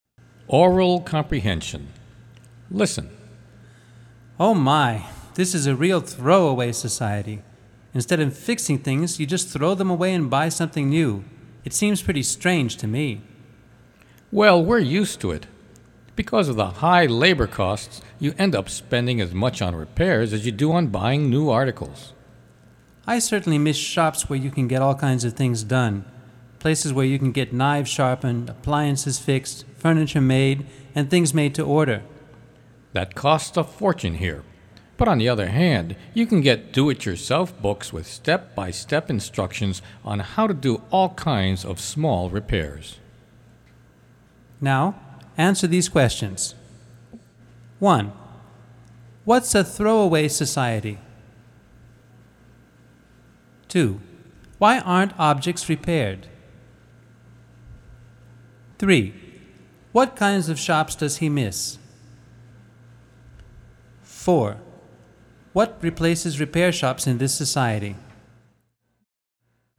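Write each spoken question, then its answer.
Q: What's a throwaway society?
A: A society where people throw things away and buy new ones instead of fixing them

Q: Why aren't objects repaired?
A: Because of high labor costs, repairs cost as much as buying new articles

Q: What kinds of shops does he miss?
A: Shops where you can get knives sharpened, appliances fixed, furniture made, and things made to order

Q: What replaces repair shops in this society?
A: Do-it-yourself books with step-by-step repair instructions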